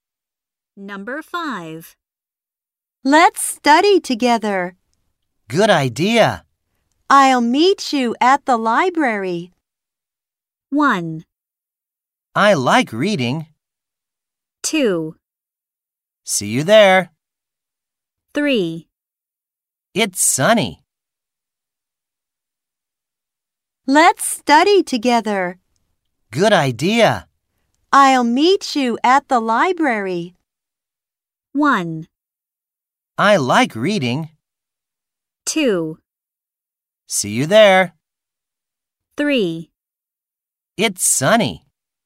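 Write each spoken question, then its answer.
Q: I'll meet you at the library.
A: 2: See you there.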